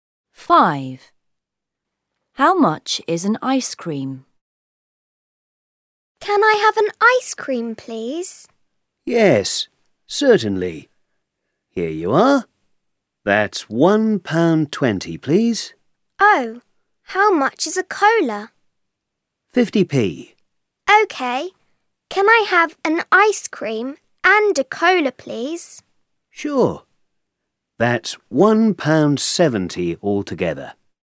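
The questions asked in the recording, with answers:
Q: How much is an ice cream?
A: £1.20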